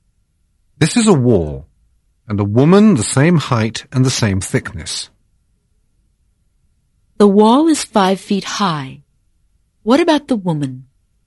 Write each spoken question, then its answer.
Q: The wall is 5 feet high. What about the woman?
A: The woman is 5 feet tall.